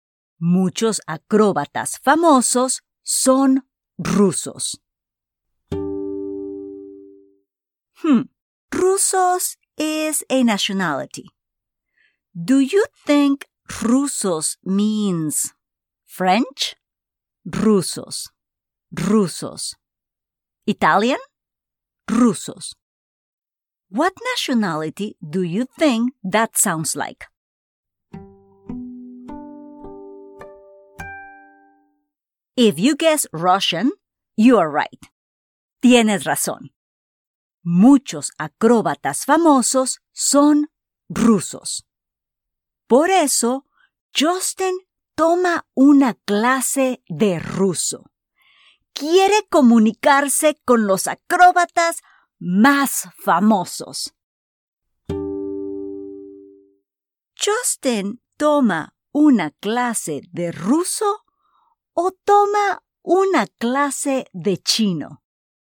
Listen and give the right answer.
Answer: Muy bien. Justin toma una clase de ruso porque quiere comunicarse con los acróbatas rusos más famosos.